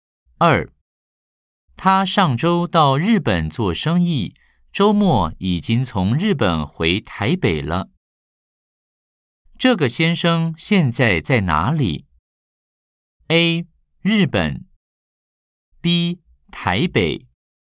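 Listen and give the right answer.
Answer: B: 台北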